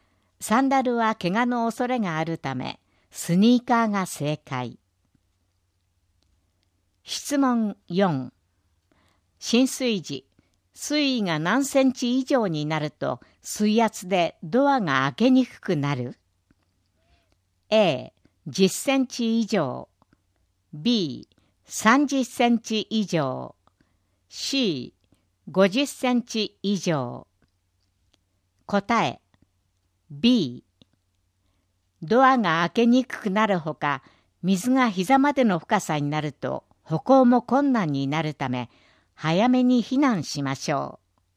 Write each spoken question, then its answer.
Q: 浸水時、水位が何センチ以上になると水圧でドアが開けにくくなる?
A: 答え B。